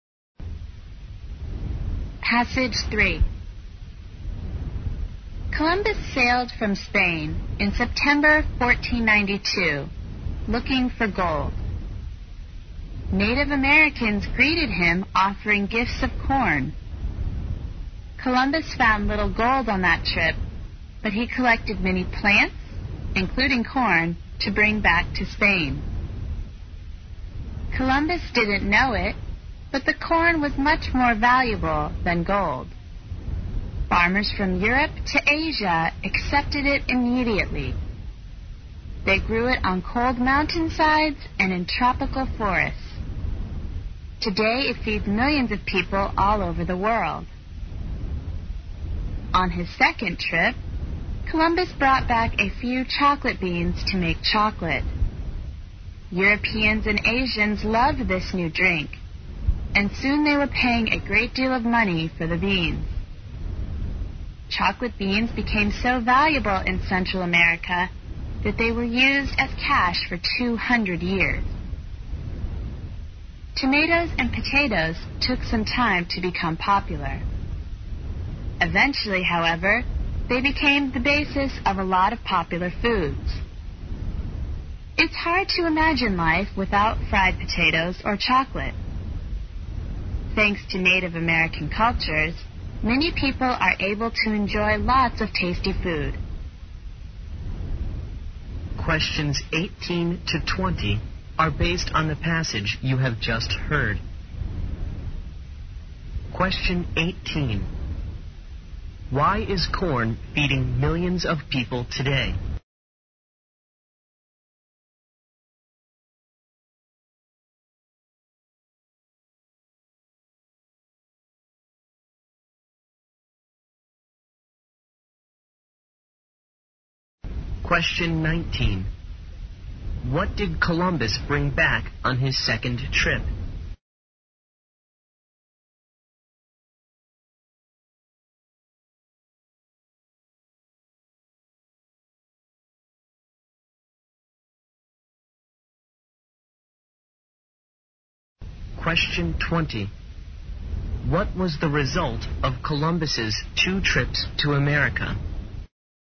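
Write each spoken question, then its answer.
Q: What did Columbus bring back on his second trip?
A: Chocolate beans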